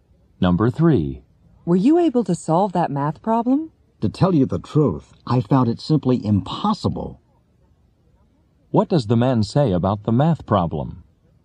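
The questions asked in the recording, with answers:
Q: What does the man say about the math problem?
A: He couldn't solve it; it was impossible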